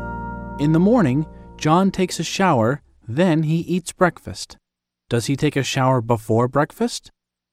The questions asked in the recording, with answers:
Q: Does he take a shower before breakfast?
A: Yes, he does. He takes a shower before breakfast.